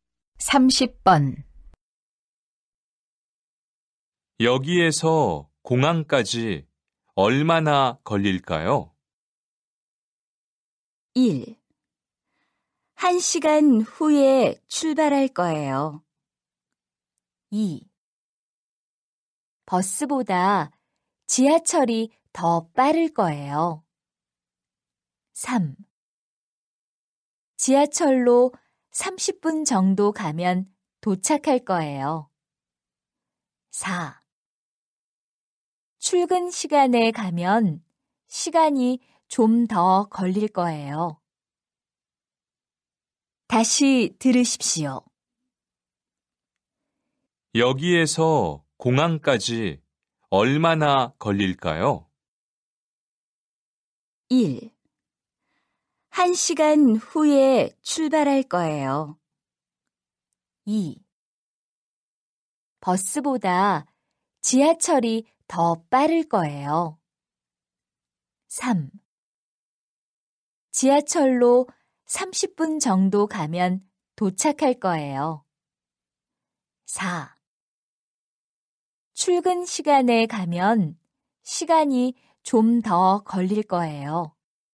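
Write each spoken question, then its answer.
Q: 여기에서 공항까지 얼마나 걸릴까요?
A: 3: 지하철로 30분 정도 가면 도착할 거예요.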